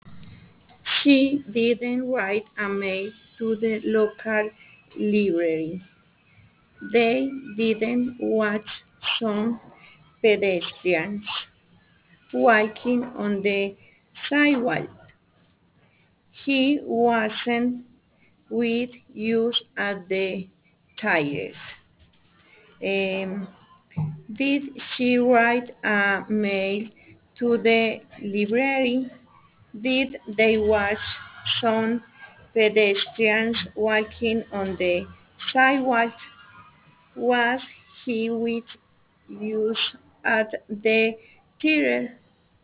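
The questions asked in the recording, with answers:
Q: Did she write a mail to the library?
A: No, she didn't.

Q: Did they watch some pedestrians walking on the sidewalk?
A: No, they didn't.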